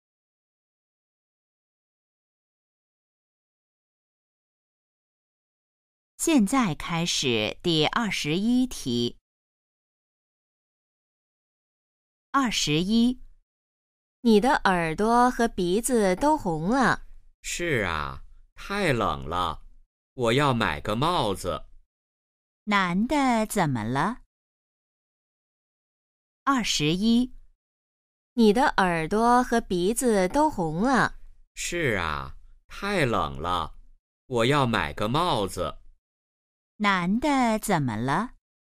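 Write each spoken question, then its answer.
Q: 男的怎么了?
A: 他很冷,耳朵和鼻子都红了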